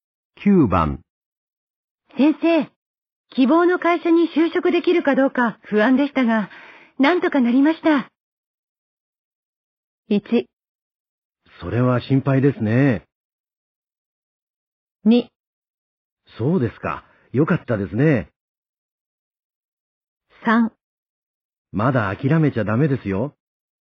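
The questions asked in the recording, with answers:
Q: 先生、希望の会社に就職できるかどうか不安でしたが、なんとかなりました。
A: 2: そうですか。よかったですね。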